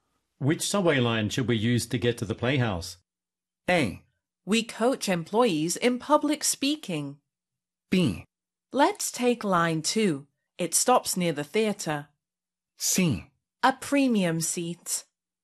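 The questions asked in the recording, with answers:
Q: Which subway line should we use to get to the playhouse?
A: B: Let's take line 2. It stops near the theater.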